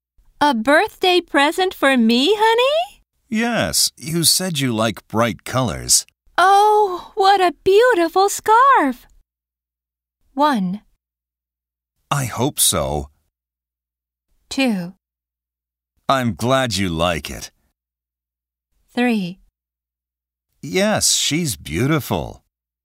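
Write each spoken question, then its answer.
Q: Oh, what a beautiful scarf!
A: 2: I'm glad you like it.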